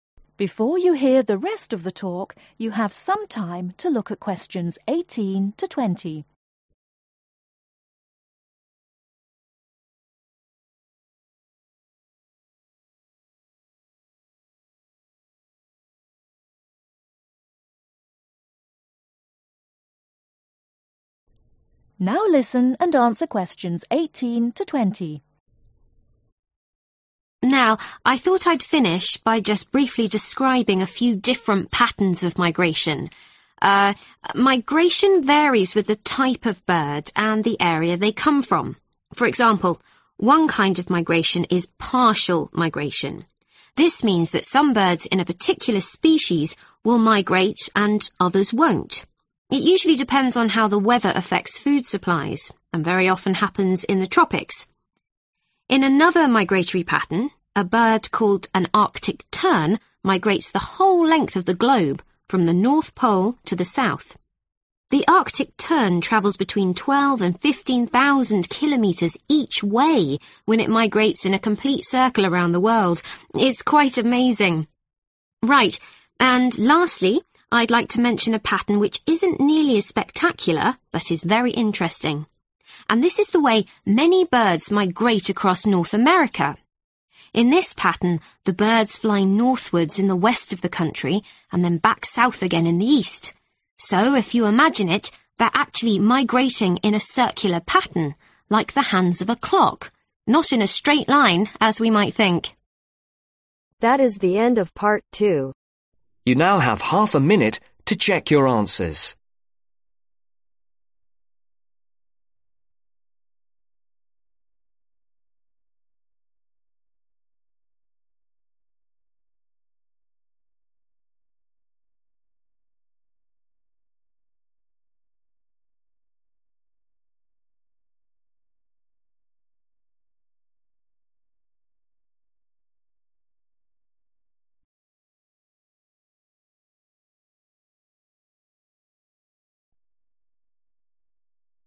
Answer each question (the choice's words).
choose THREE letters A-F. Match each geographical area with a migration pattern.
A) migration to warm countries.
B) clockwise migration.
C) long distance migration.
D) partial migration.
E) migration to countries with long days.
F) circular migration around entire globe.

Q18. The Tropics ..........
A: partial migration.

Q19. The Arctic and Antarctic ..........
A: circular migration around entire globe.

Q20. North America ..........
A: clockwise migration.